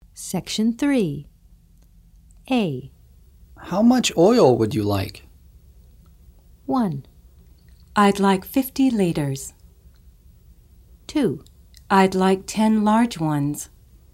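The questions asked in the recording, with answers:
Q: How much oil would you like?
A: 1: I'd like 50 liters.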